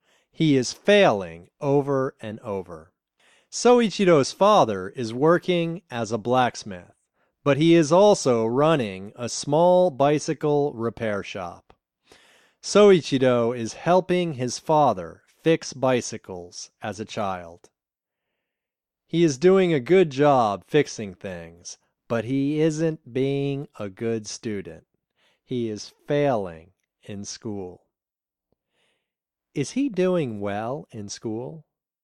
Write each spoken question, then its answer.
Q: Is he doing well in school?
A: No, he isn't doing well in school.